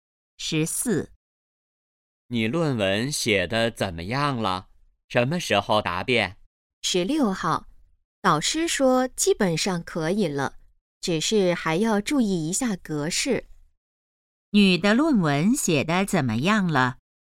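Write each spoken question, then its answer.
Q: 女的论文写得怎么样了?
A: 基本上可以了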